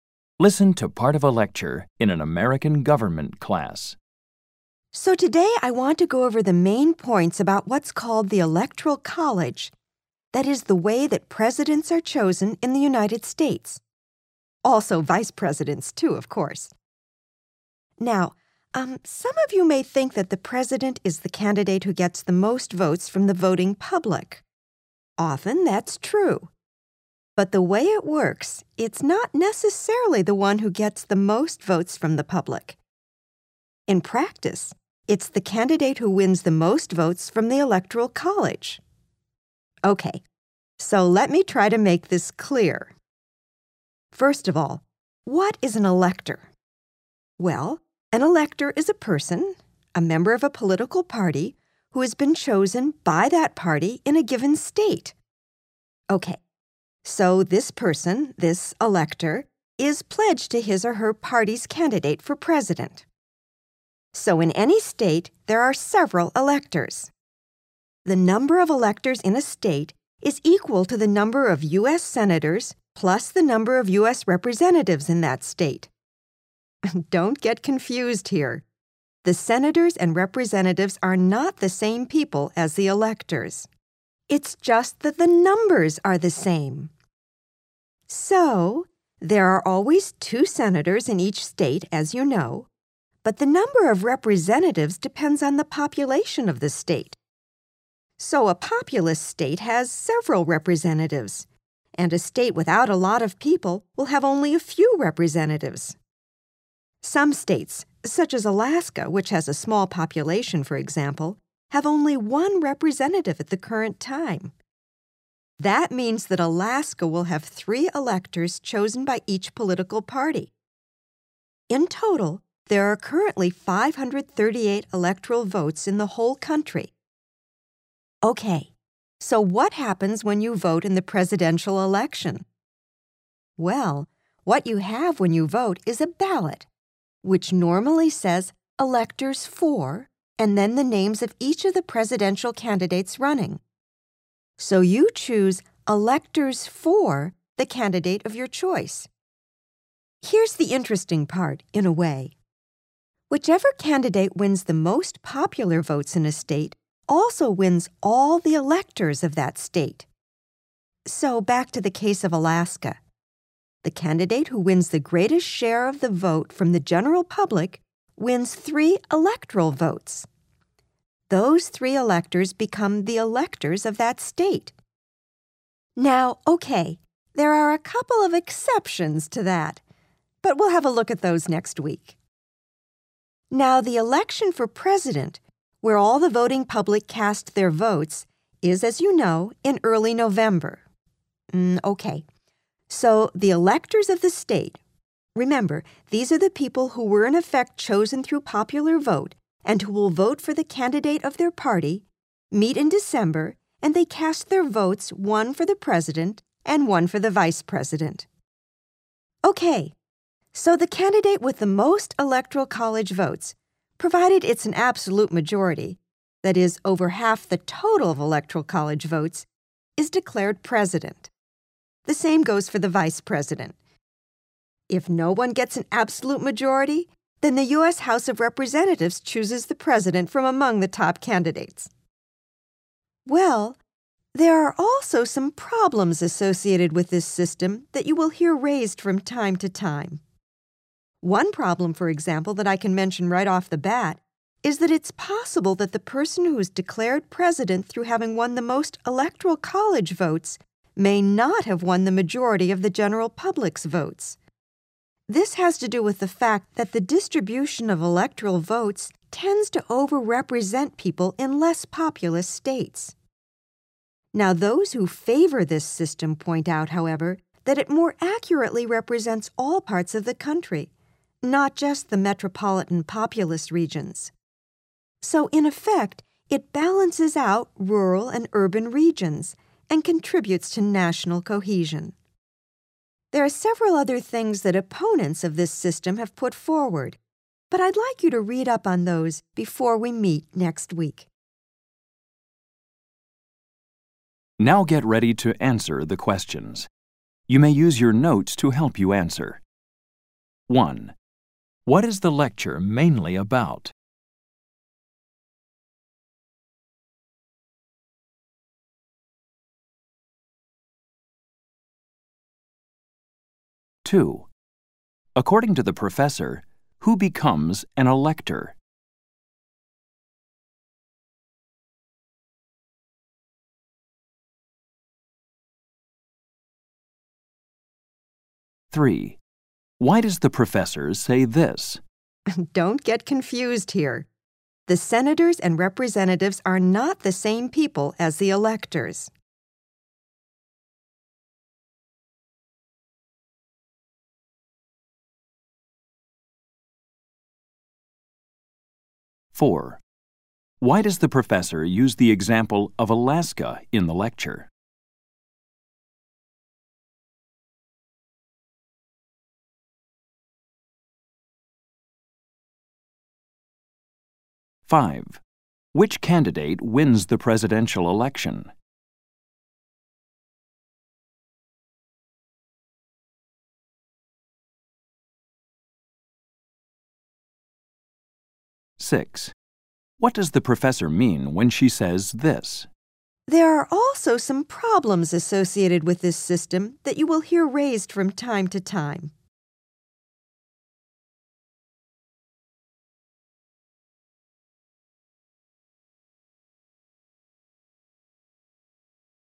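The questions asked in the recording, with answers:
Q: What is the lecture mainly about?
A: How the Electoral College system chooses the U.S. president

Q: According to the professor, who becomes an elector?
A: A political party member chosen by that party in a state and pledged to its candidate

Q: Which candidate wins the presidential election?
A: The candidate with an absolute majority of Electoral College votes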